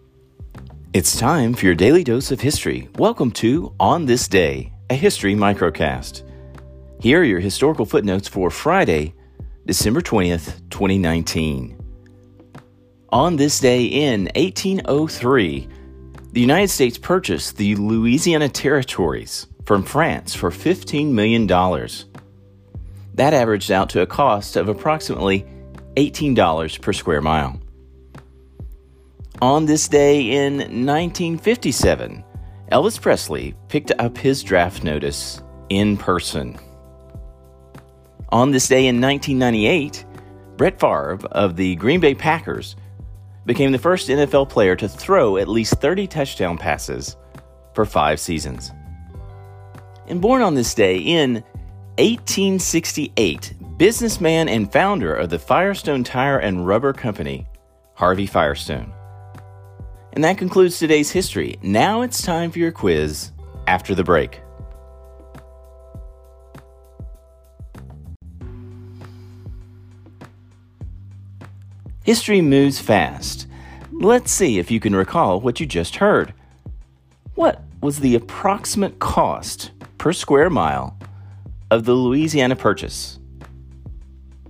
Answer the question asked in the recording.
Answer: Answer, $18 per mile.